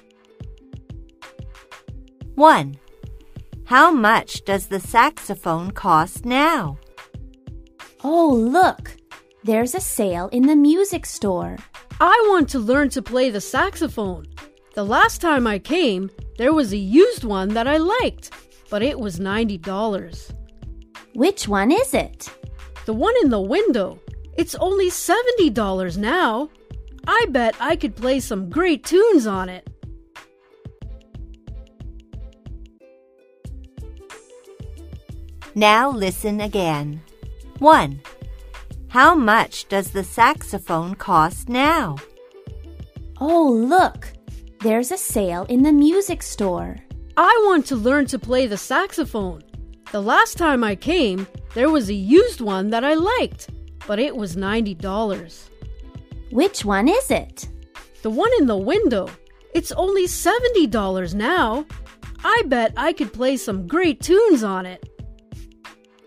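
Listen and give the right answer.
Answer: $70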